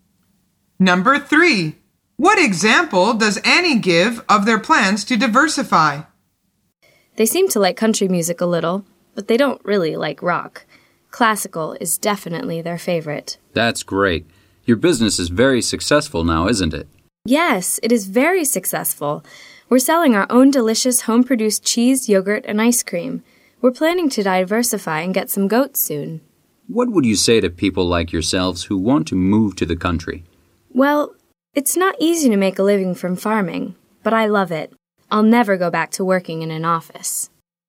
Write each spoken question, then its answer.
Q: What example does Annie give of their plans to diversify?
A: The answer is they are going to get some goats.